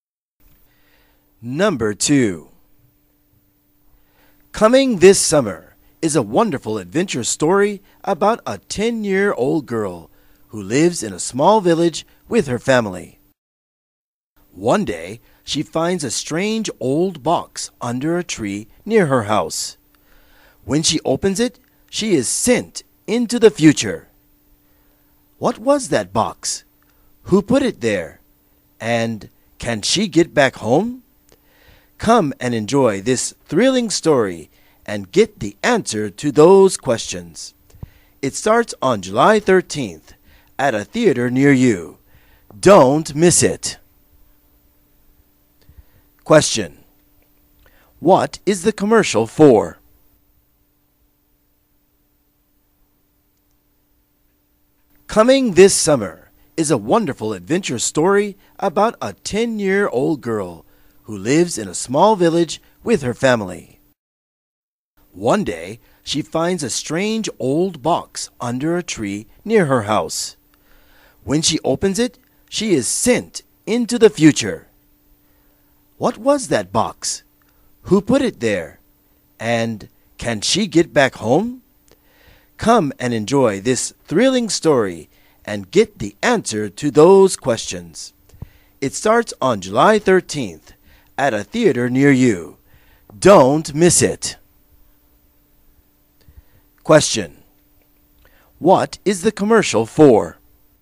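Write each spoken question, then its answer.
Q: What is the commercial for?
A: An adventure movie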